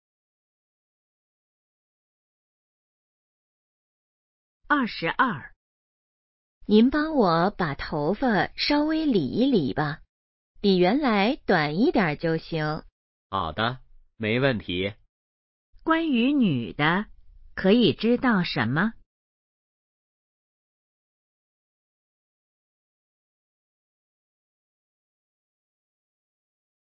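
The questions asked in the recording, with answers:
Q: 关于女的,可以知道什么?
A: 想理发,剪短一点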